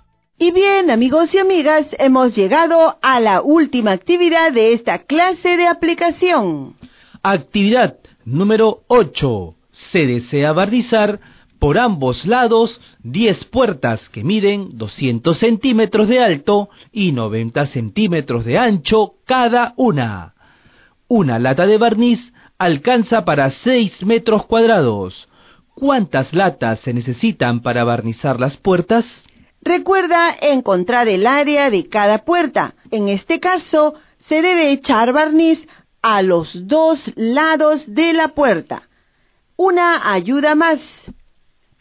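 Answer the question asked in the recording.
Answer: 6 latas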